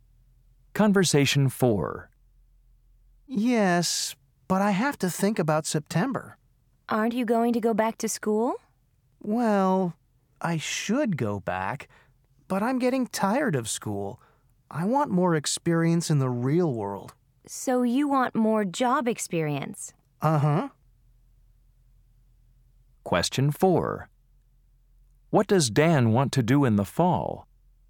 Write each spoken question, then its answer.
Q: What does Dan want to do in the fall?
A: I want to work too